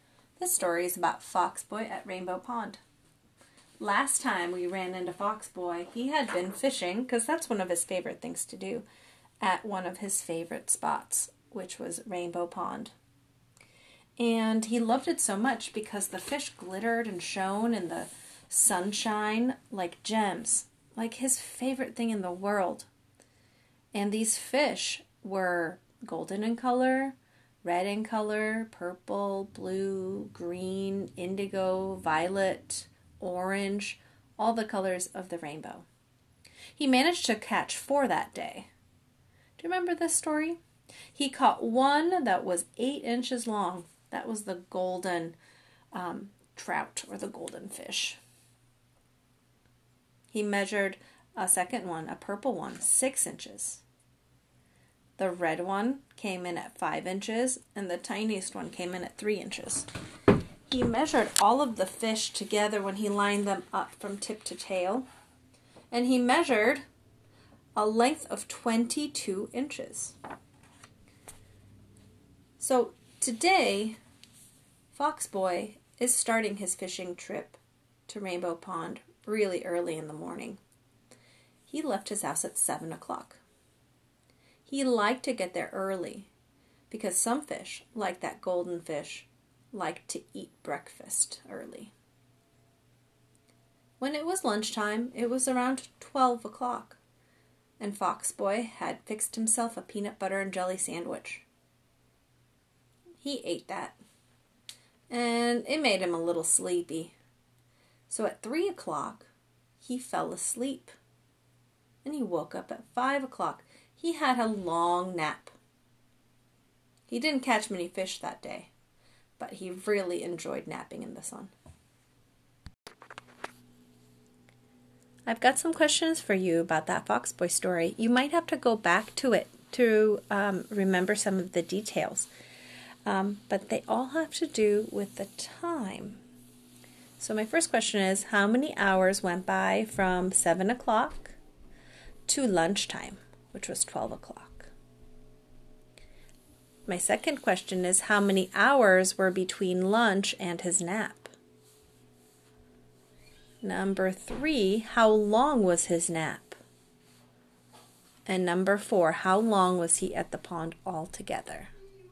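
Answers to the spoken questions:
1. 5 hours
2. 3 hours
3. 2 hours
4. 10 hours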